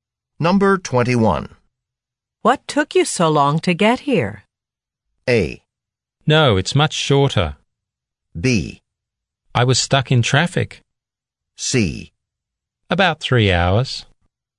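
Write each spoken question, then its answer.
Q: What took you so long to get here?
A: B: I was stuck in traffic.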